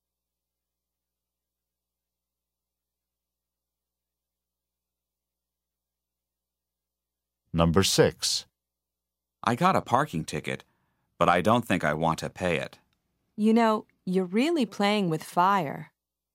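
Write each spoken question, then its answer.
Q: What does the woman mean?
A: Not paying the ticket is risky.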